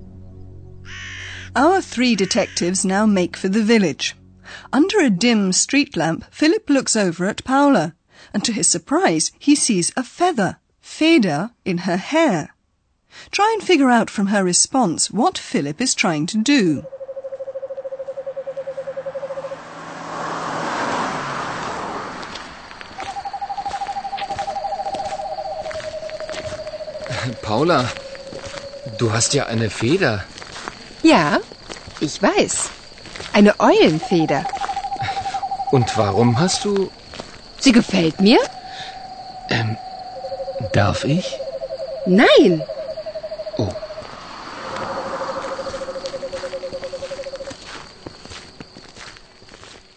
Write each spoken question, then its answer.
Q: Try and figure out from her response what Philip is trying to do.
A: It sounds as if Philip is trying to pull the feather out of Paula's hair.